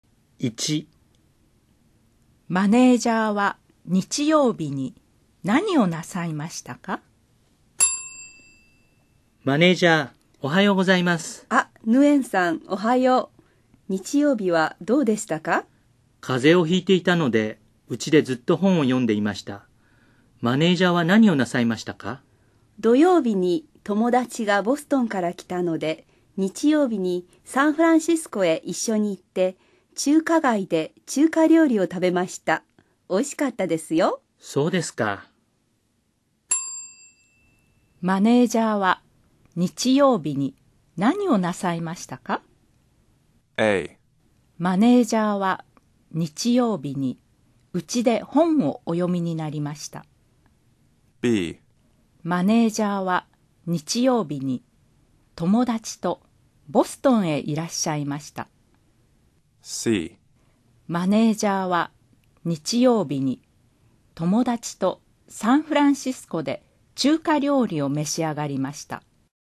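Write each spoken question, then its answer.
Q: マネージャーは日曜日に何をなさいましたか?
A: C: マネージャーは日曜日に友達とサンフランシスコで中華料理を召し上がりました。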